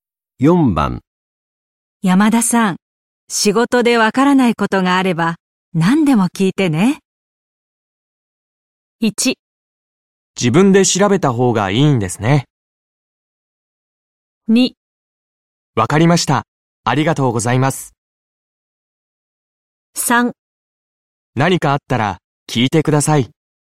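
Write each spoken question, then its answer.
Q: 山田さん、仕事でわからないことがあれば何でも聞いてね。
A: 2: わかりました、ありがとうございます。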